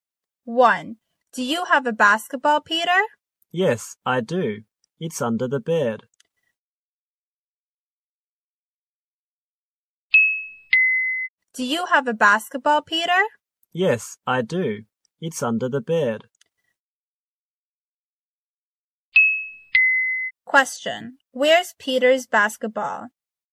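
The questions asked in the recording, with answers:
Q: Where's Peter's basketball?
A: Under the bed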